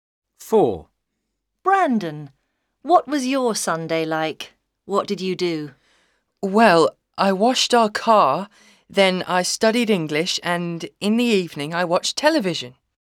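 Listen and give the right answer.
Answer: He washed the car, studied English and watched television.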